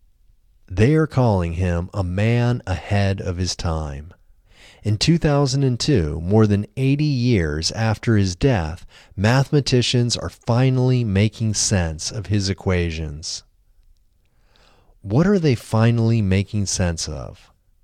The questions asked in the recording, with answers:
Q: What are they finally making sense of?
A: They are finally making sense of his equations.